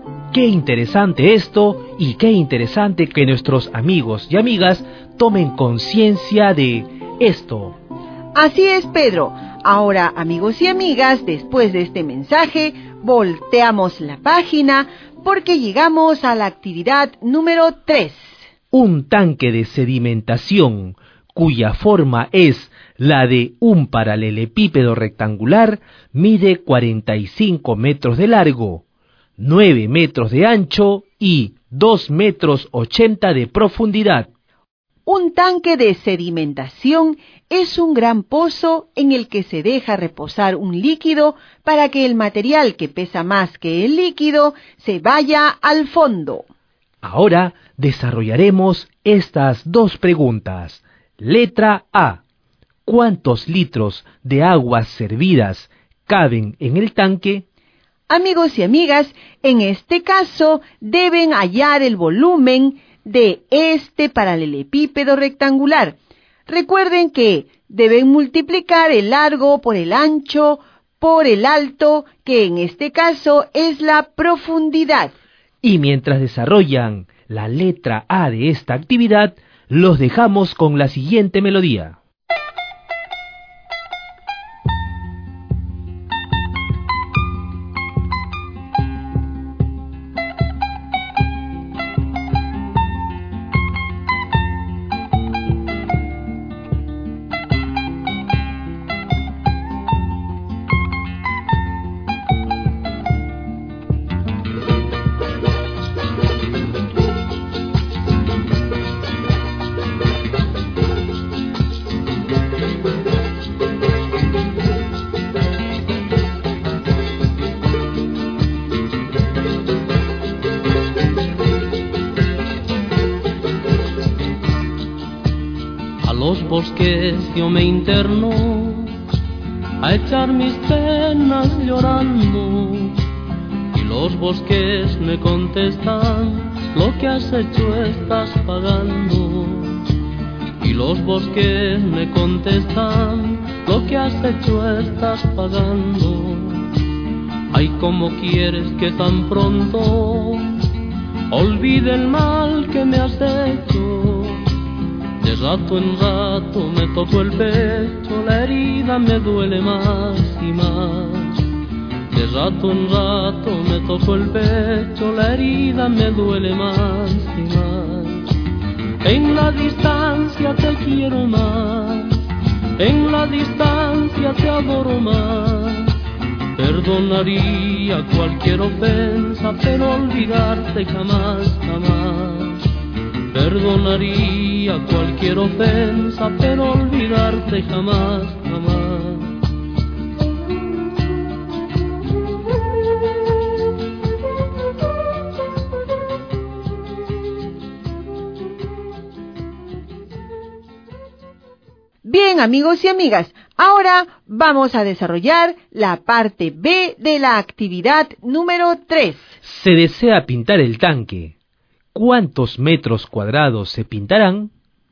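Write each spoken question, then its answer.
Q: Letra A. ¿Cuántos litros de aguas servidas caben en el tanque?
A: 1 134 000 litros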